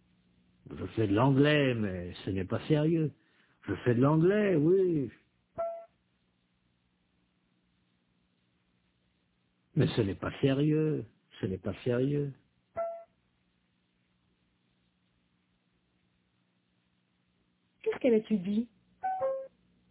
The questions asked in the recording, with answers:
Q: Qu'est-ce qu'elle étudie?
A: L'anglais, mais ce n'est pas sérieux.